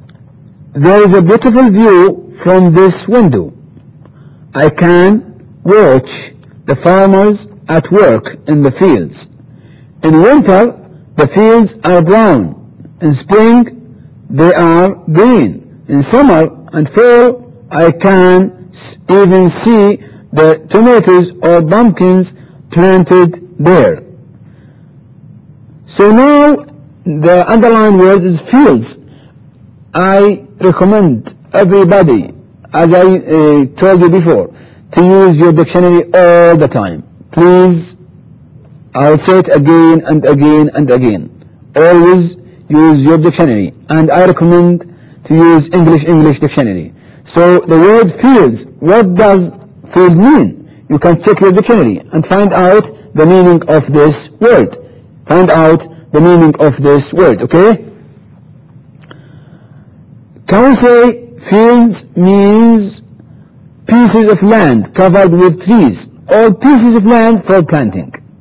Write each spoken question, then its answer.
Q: Can we say fields means pieces of land covered with trees or pieces of land for planting?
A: I think number B, which is pieces of land for planting, this is the right definition of fields.